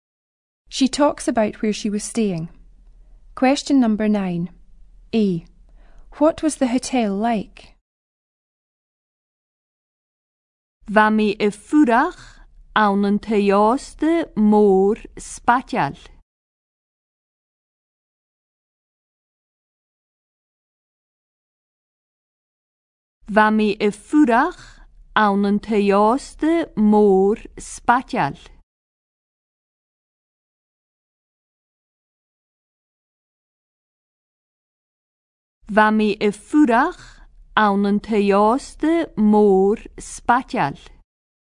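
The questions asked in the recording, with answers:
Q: What was the hotel like?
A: Big and posh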